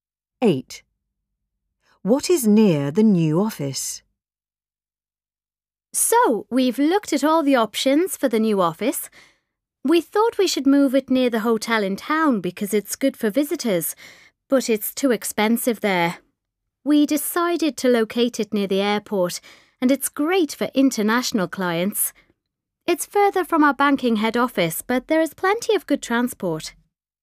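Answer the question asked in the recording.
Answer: the airport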